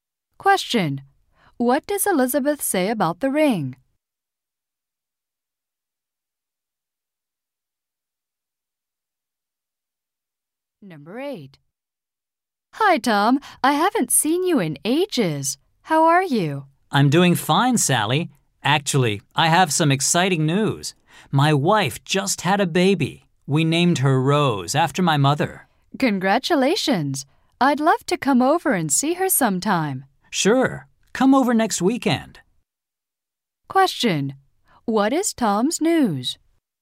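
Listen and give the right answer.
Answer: His wife just had a baby.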